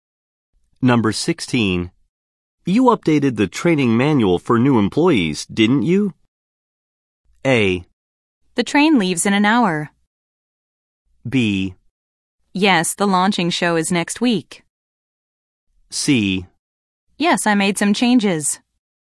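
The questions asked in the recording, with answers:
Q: You updated the training manual for new employees, didn't you?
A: C: Yes, I made some changes.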